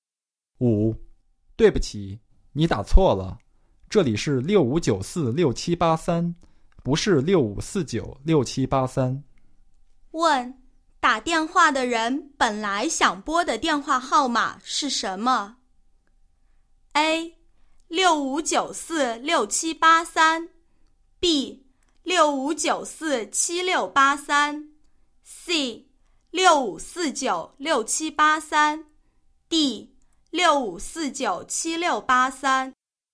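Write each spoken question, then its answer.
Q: 问,打电话的人本来想拨的电话号码是什么?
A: C: 65496783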